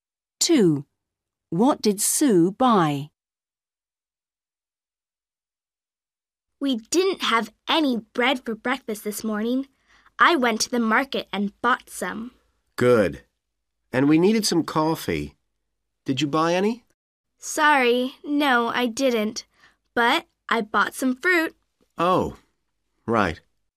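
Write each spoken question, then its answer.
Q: What did Sue buy?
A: bread and fruit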